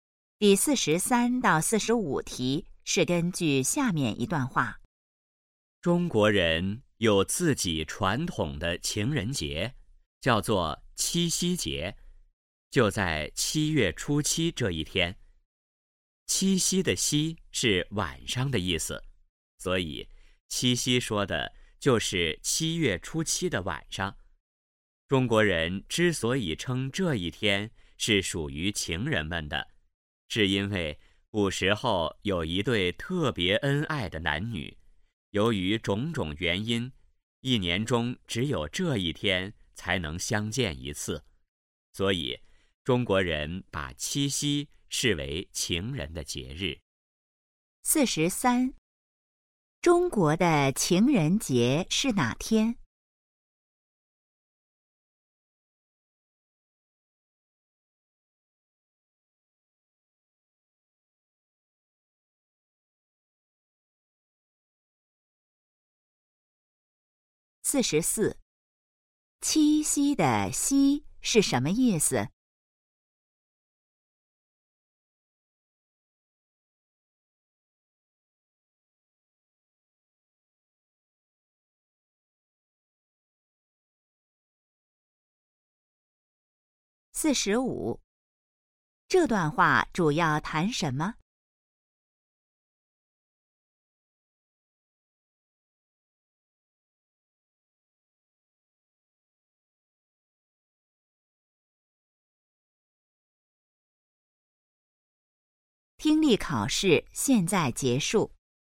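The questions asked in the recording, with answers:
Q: 中国的情人节是哪天?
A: 7月初7(七夕节)

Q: 七夕的夕是什么意思?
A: 晚上

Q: 这段话主要谈什么?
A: 中国的情人节七夕节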